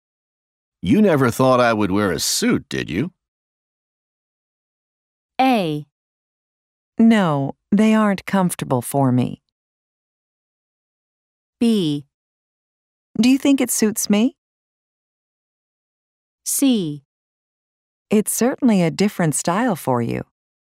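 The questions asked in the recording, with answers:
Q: You never thought I would wear a suit, did you?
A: C: It's certainly a different style for you.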